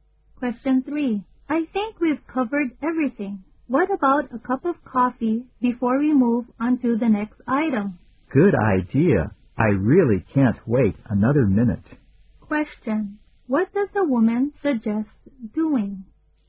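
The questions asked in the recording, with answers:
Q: What does the woman suggest doing?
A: Having a cup of coffee (taking a break)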